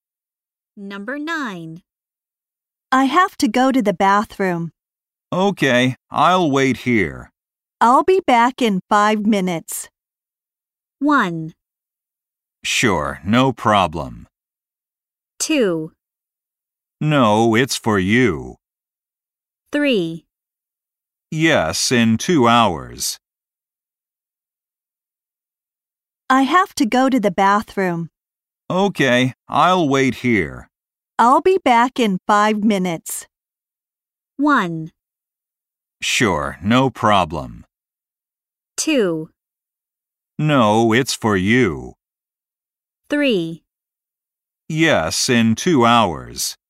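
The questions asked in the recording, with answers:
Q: I'll be back in 5 minutes.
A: 1: Sure, no problem.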